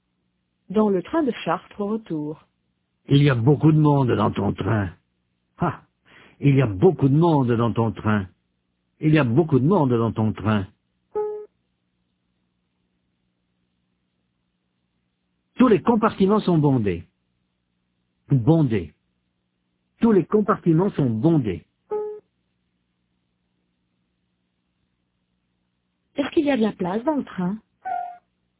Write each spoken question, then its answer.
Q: Est-ce qu'il y a de la place dans le train?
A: Non, tous les compartiments sont bondés.